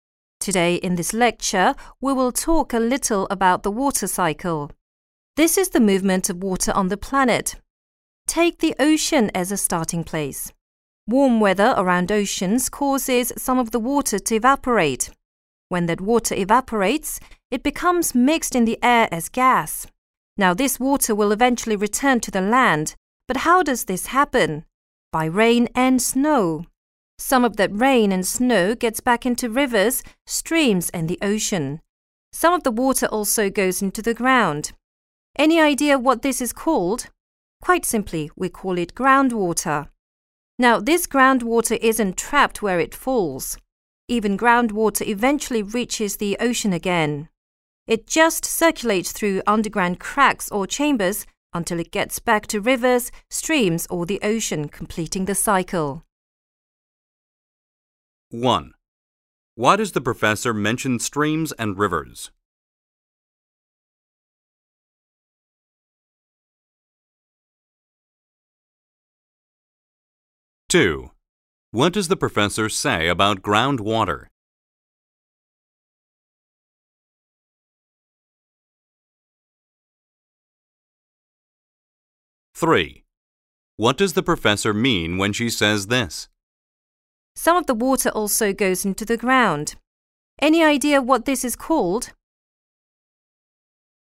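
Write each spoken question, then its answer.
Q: What does the professor say about groundwater?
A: It isn't trapped; it circulates underground and eventually reaches the ocean again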